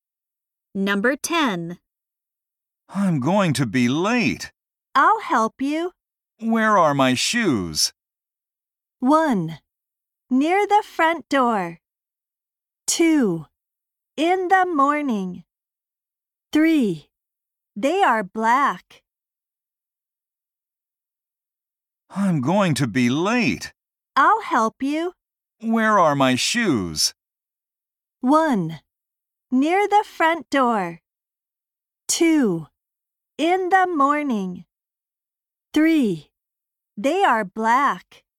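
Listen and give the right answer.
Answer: 1: Near the front door.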